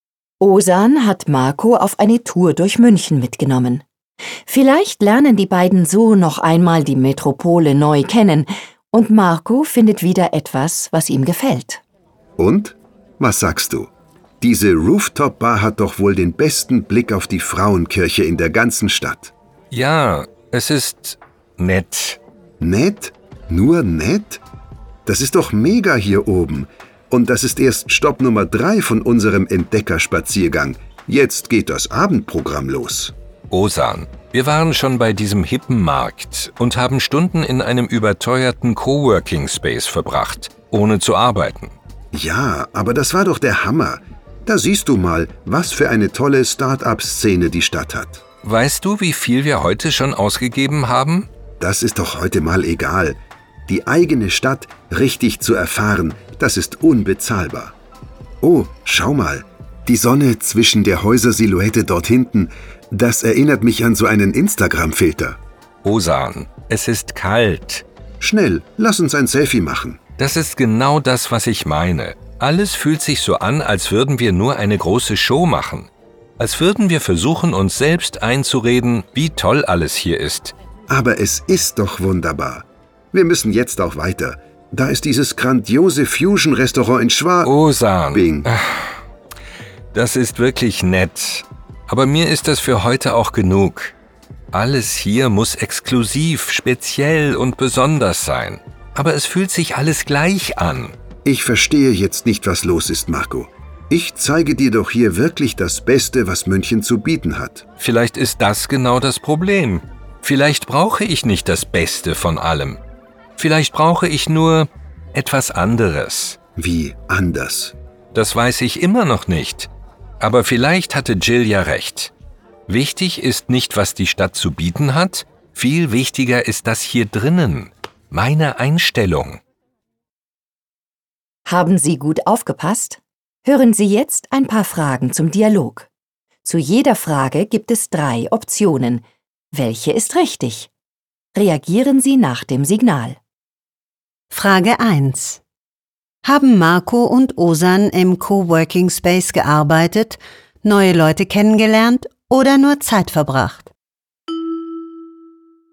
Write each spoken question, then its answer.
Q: Haben Marco und Ozan im Coworking Space gearbeitet, neue Leute kennengelernt oder nur Zeit verbracht?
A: Im Coworking Space haben sie nur Zeit verbracht.